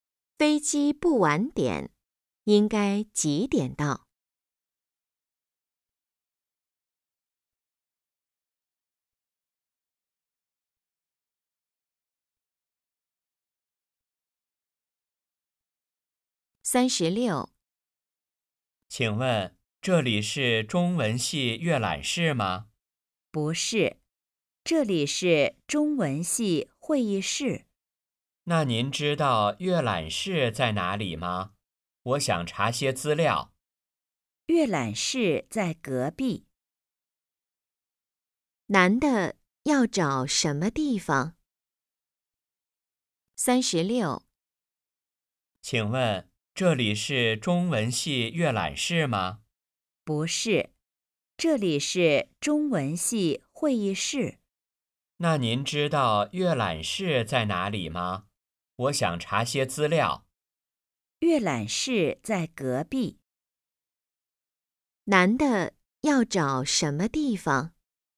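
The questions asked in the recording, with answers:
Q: 男的要找什么地方?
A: 中文系阅览室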